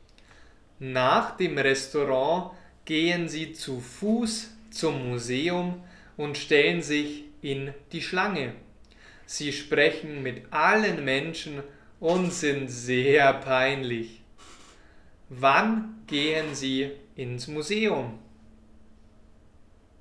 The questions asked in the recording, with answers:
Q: Wann gehen Sie ins Museum?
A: Nach dem Restaurant.